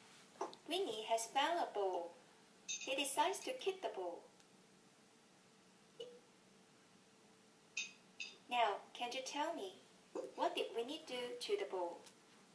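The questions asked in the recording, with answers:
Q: Now, can you tell me, what did Winnie do to the ball?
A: He kicked the ball.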